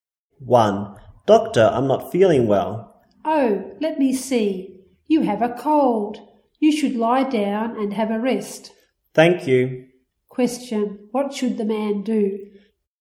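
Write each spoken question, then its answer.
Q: What should the man do?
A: Lie down and have a rest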